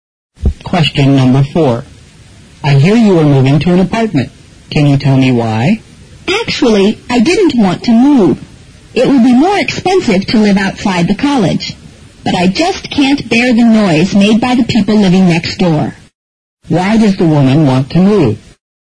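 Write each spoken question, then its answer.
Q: Why does the woman want to move?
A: She can't bear the noise made by her next-door neighbours.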